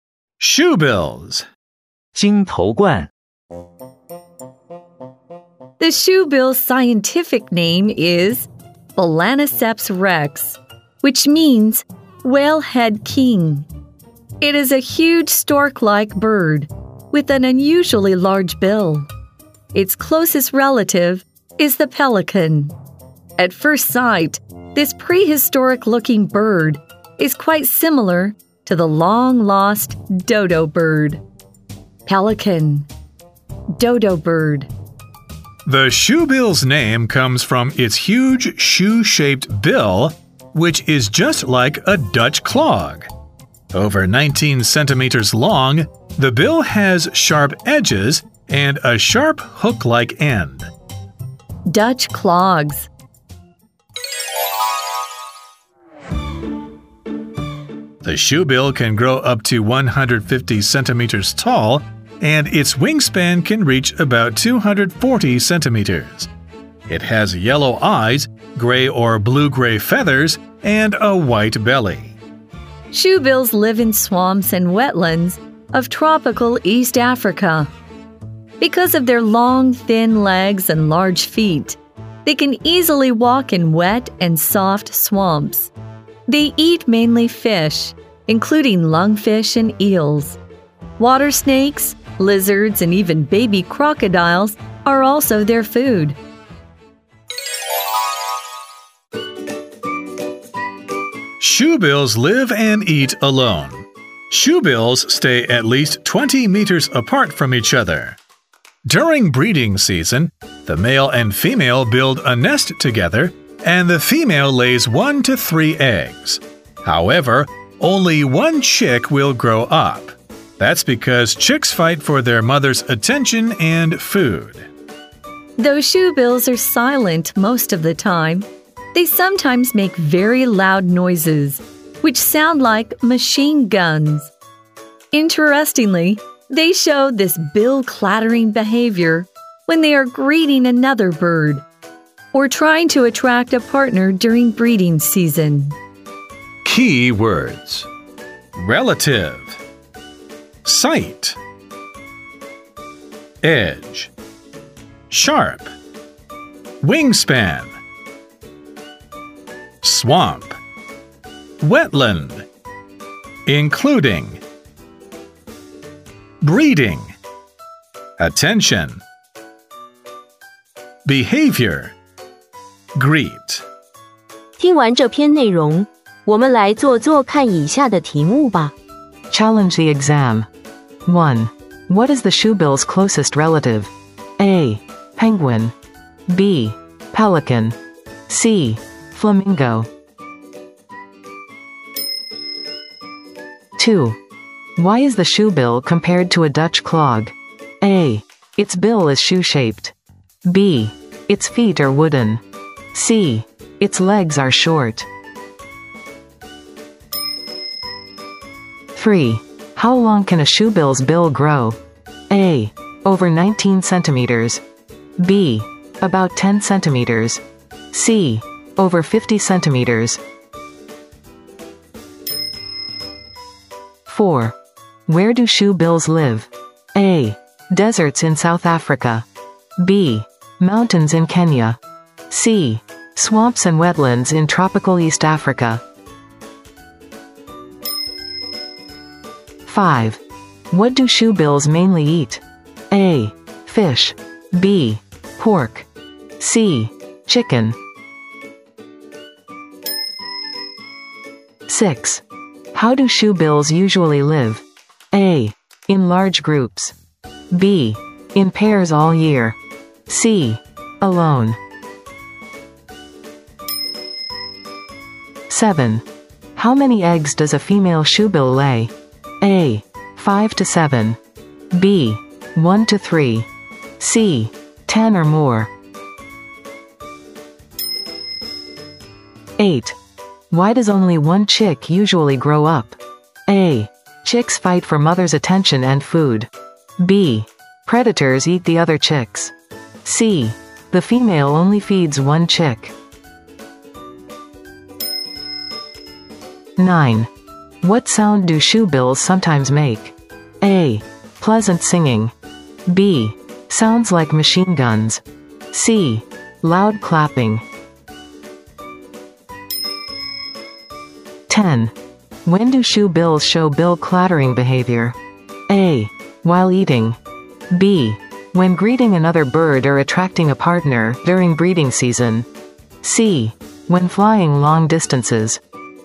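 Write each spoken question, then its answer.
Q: What is the shoebill's closest relative?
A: B: Pelican.

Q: Why is the shoebill compared to a Dutch clog?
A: A: Its bill is shoe-shaped.

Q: How long can a shoebill's bill grow?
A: A: Over 19 centimeters.

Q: Where do shoe bills live?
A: C: Swamps and wetlands in tropical East Africa.

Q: What do shoe bills mainly eat?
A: A: Fish.

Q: How do shoe bills usually live?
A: C: Alone.

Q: How many eggs does a female shoe bill lay?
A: B: 1 to 3.

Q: Why does only one chick usually grow up?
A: A: Chicks fight for mother's attention and food.

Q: What sound do shoebills sometimes make?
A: B: Sounds like machine guns.

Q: When do shoebills show bill clattering behavior?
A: B: When greeting another bird or attracting a partner during breeding season.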